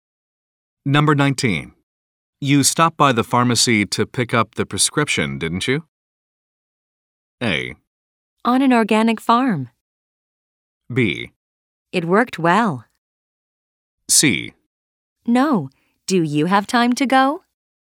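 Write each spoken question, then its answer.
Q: You stopped by the pharmacy to pick up the prescription, didn't you?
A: C: No. Do you have time to go?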